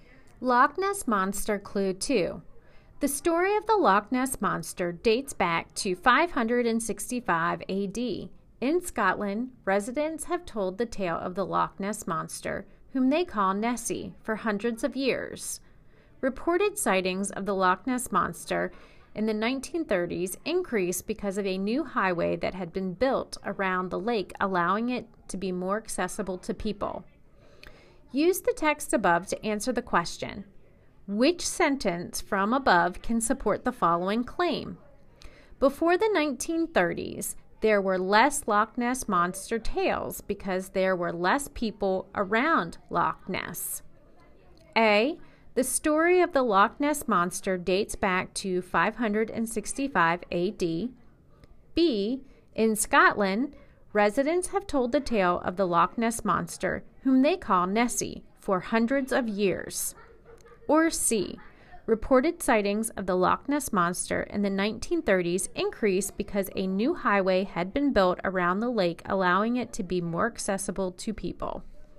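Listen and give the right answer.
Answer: C: Reported sightings of the Loch Ness Monster in the 1930s increased because a new highway had been built around the lake, allowing it to be more accessible to people.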